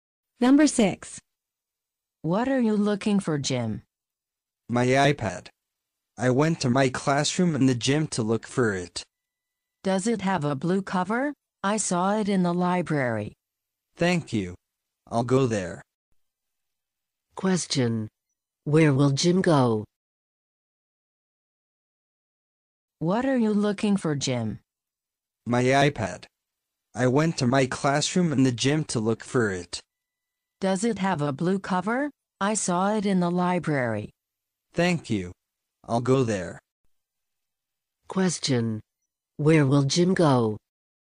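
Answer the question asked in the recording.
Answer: To the library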